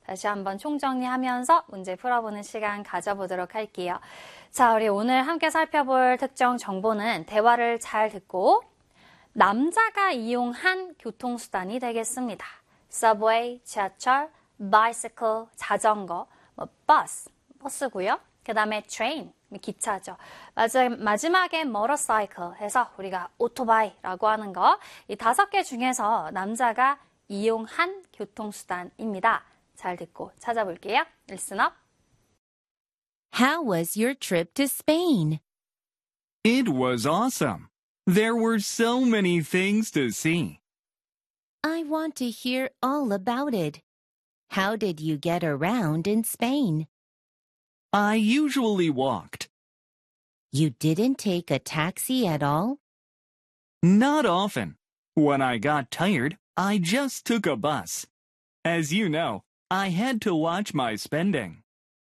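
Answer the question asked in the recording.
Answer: bus, 버스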